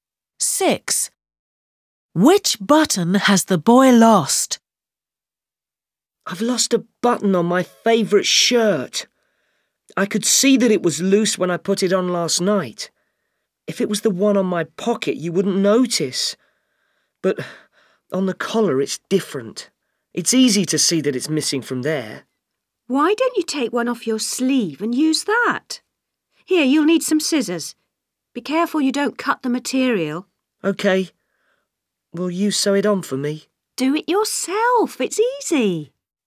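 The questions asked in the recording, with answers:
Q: Six. Which button has the boy lost?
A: the one on the collar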